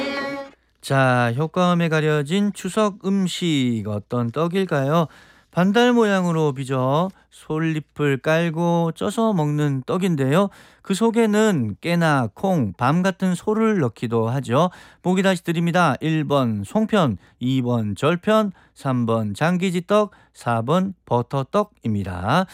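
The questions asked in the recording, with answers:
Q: 효과음에 가려진 추석 음식 어떤 떡일까요?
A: 1번: 송편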